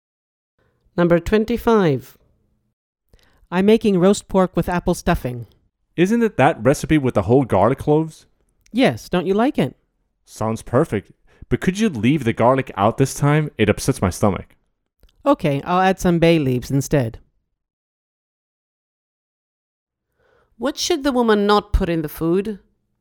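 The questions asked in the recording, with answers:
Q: What should the woman not put in the food?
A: garlic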